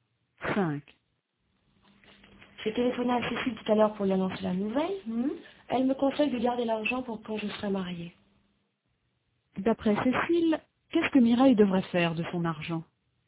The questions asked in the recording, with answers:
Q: D'après Cécile, qu'est-ce que Mireille devrait faire de son argent ?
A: Elle devrait le garder pour quand elle sera mariée.